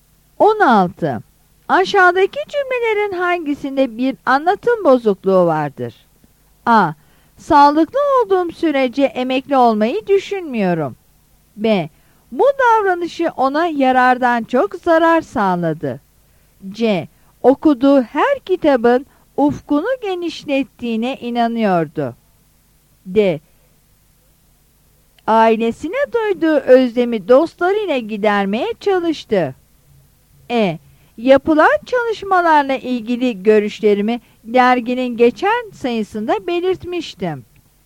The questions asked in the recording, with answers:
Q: Aşağıdaki cümlelerin hangisinde bir anlatım bozukluğu vardır?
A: Yanıt B'dir.